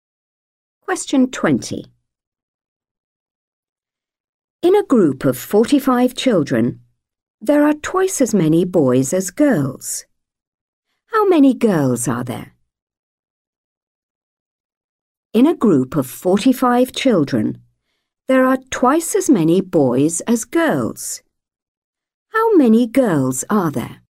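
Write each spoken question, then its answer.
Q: How many girls are there?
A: 15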